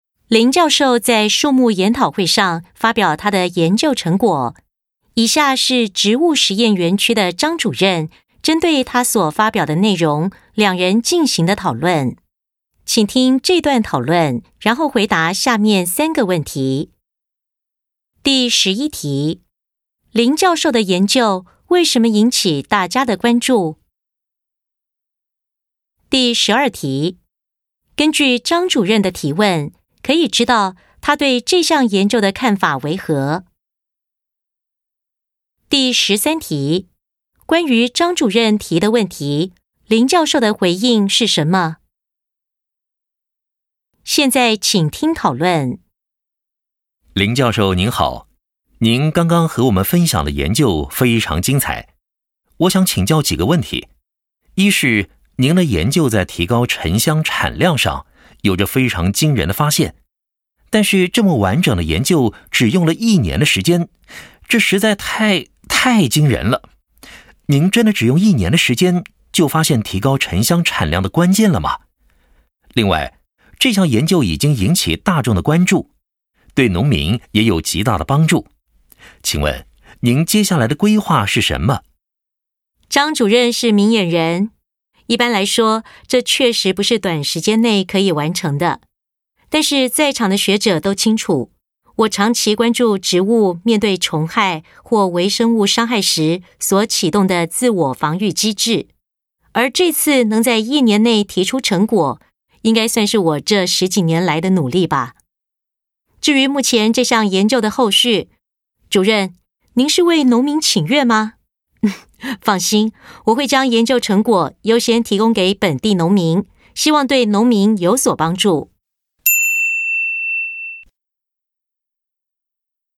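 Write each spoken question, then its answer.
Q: 林教授的研究为什么引起大家的关注?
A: 研究发现了提高沉香产量的关键,对农民有极大帮助

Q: 关于张主任提的问题,林教授的回应是什么?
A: 这个成果是他十几年来长期研究的结果,并会优先把研究成果提供给本地农民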